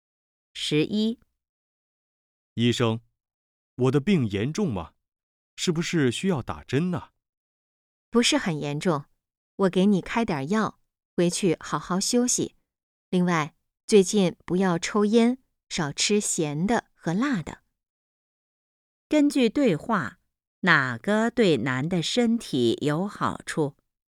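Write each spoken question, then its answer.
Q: 根据对话,哪个对男的身体有好处?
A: 好好休息、不抽烟、少吃咸的和辣的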